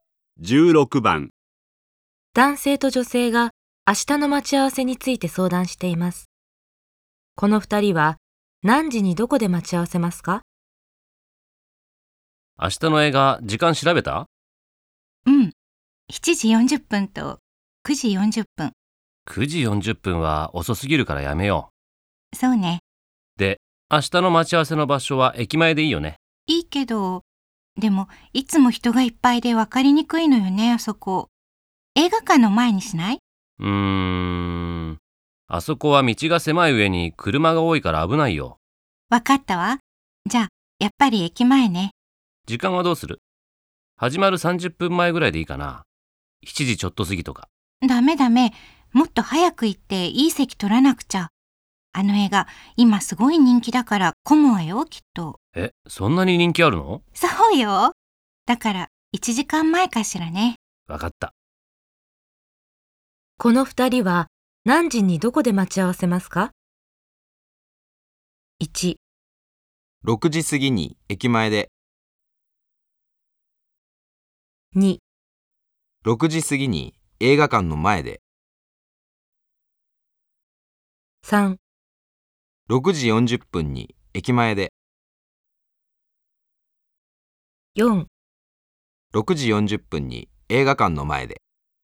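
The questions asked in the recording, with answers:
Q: この二人は何時にどこで待ち合わせますか?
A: 3: 6時40分に駅前で。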